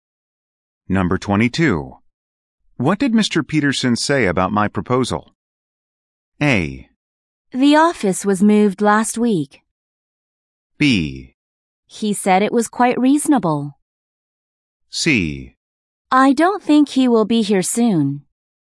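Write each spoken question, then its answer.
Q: What did Mr. Peterson say about my proposal?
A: B: He said it was quite reasonable.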